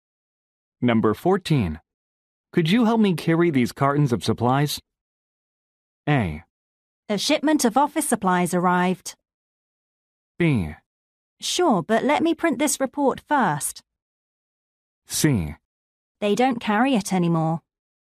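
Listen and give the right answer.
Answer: B: Sure, but let me print this report first.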